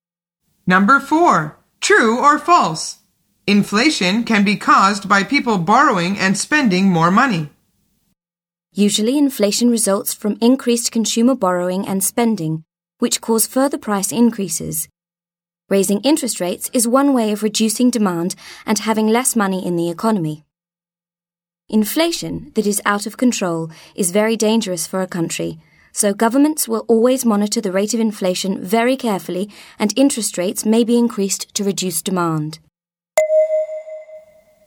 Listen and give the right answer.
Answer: The answer is true.